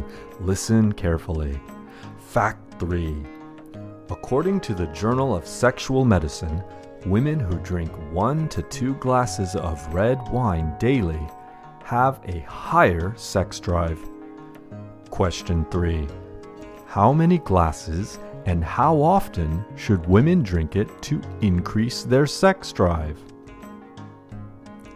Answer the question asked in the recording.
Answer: According to the Journal of Sexual Medicine, women who drink one to two glasses of red wine daily have a higher sex drive.